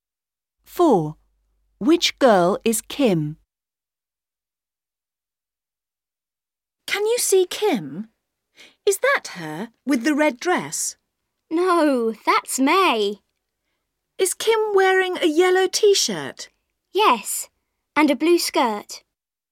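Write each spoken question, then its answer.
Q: Which girl is Kim?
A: The girl in a yellow T-shirt and a blue skirt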